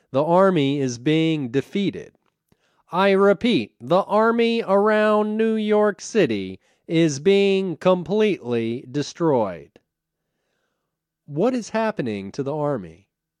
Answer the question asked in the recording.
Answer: The army is being completely destroyed.